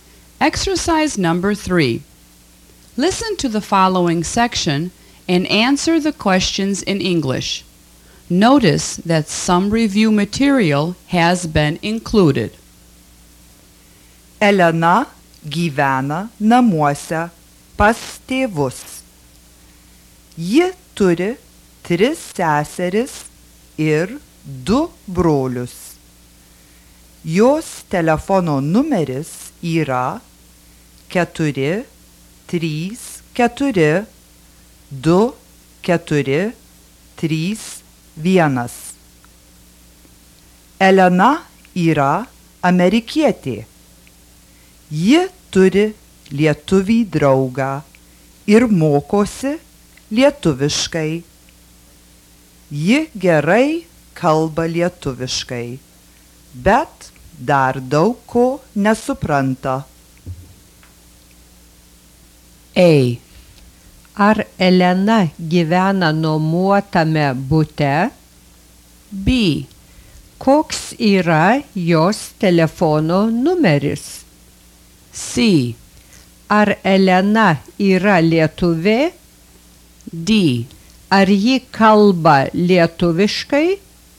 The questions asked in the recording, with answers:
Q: Ar Elena gyvena nuomuotame bute?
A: No, She lives at home with her parents.

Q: Koks yra jos telefono numeris?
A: Her telephone number is

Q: Ar Elena yra lietuvė?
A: No, Elena is an American.